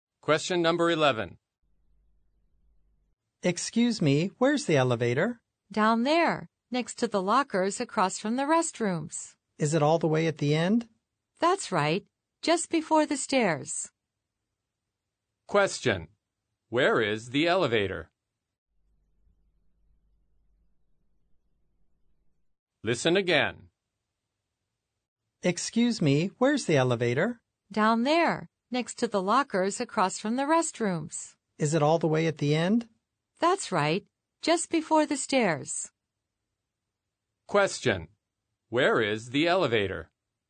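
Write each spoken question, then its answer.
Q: Where is the elevator?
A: At the end, next to the lockers, across from the restrooms, just before the stairs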